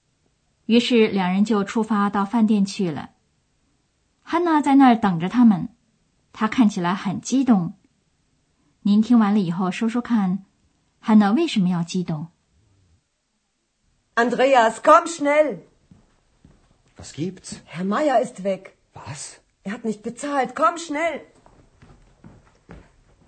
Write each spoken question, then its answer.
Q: 汉娜为什么要激动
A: 因为玛雅先生走了。